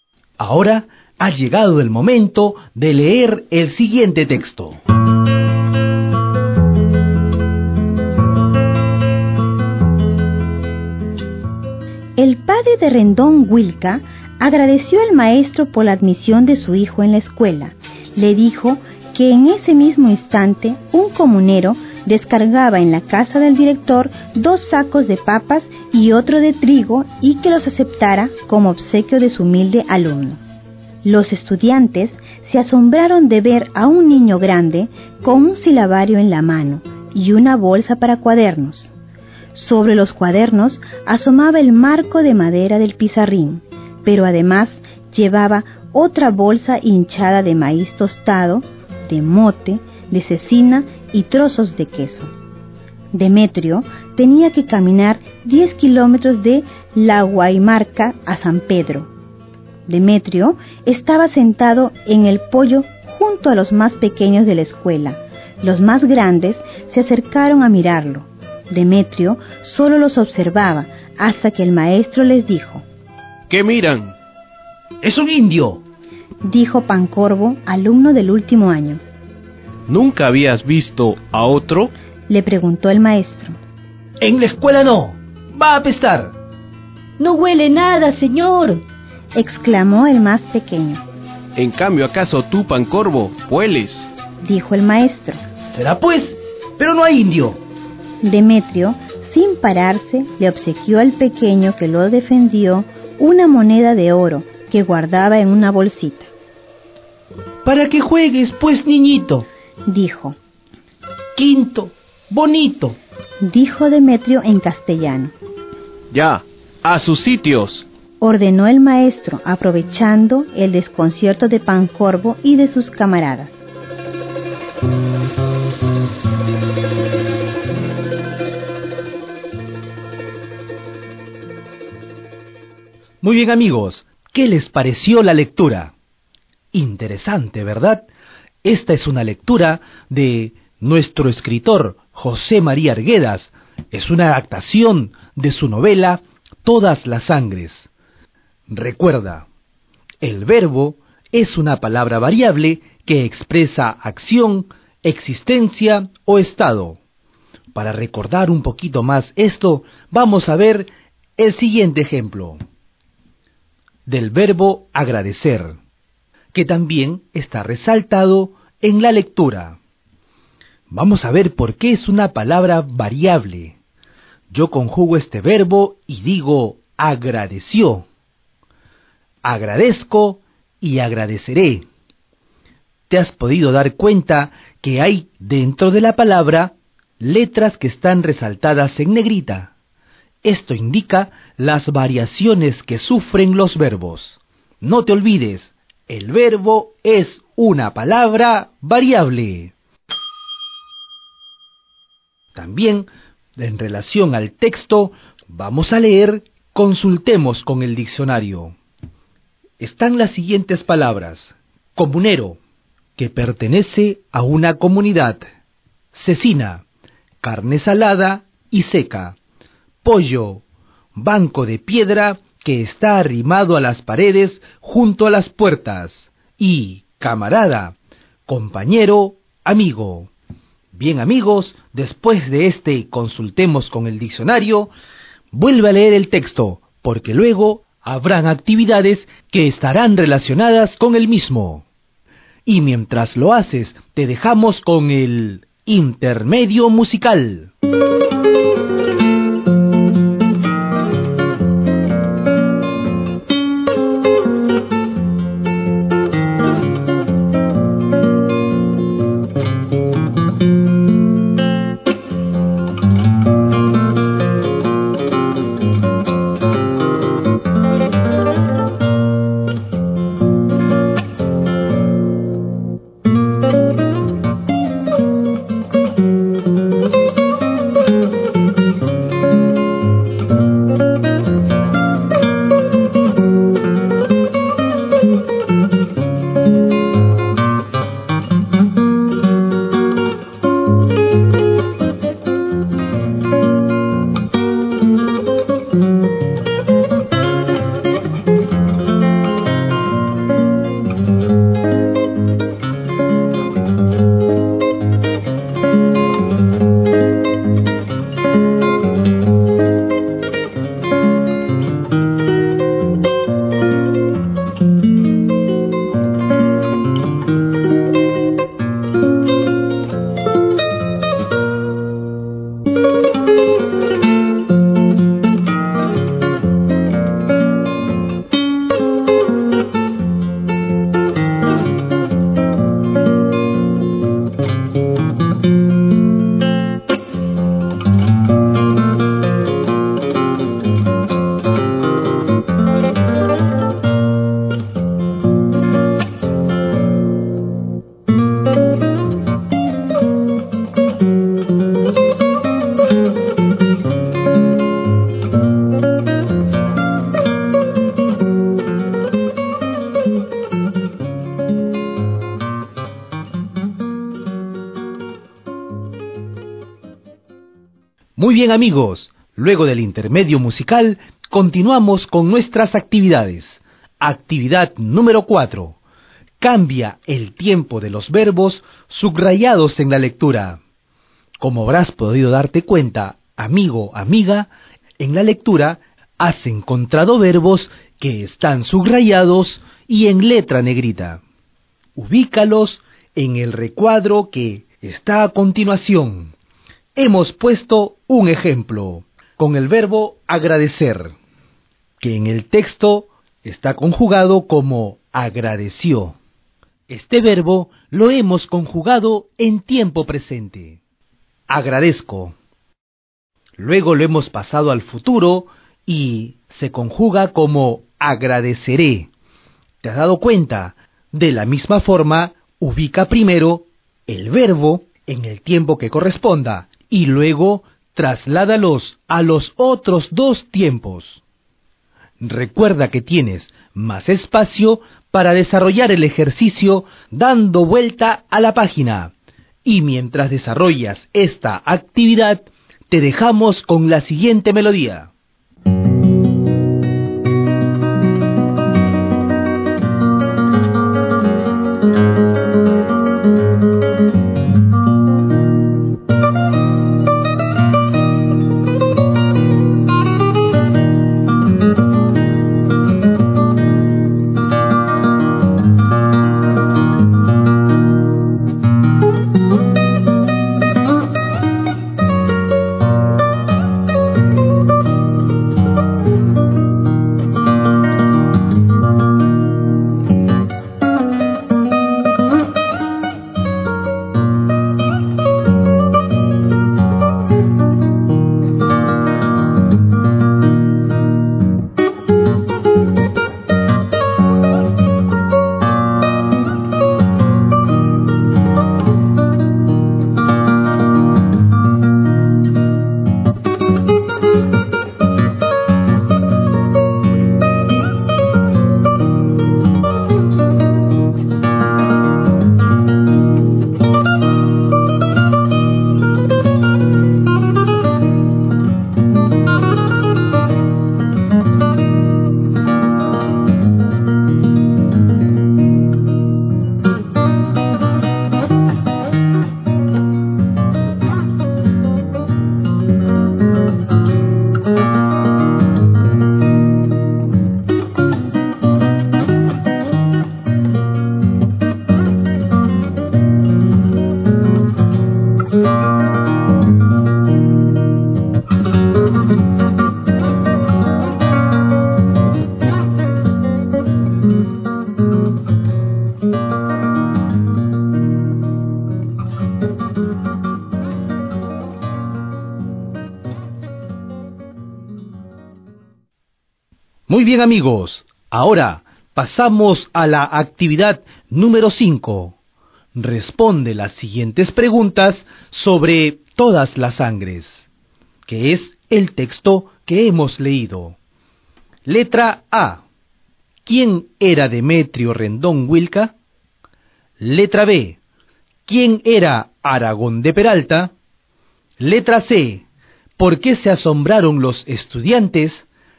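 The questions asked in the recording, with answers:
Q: ¿Por qué se asombraron los estudiantes?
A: Porque vieron a un niño grande con un silabario en la mano y una bolsa para cuadernos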